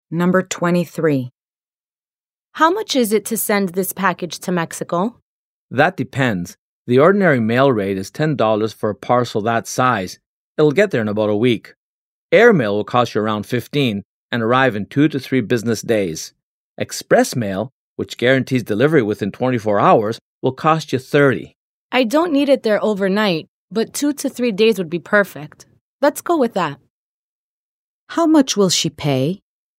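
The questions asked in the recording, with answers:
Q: How much will she pay?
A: $15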